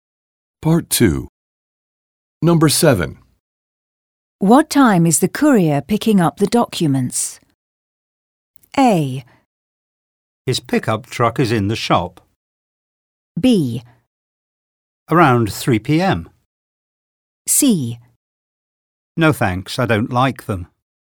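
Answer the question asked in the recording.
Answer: B: Around 3 p.m.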